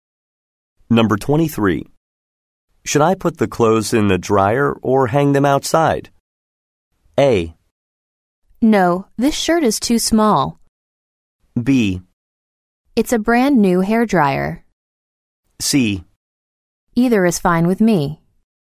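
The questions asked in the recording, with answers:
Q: Should I put the clothes in the dryer or hang them outside?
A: C: Either is fine with me.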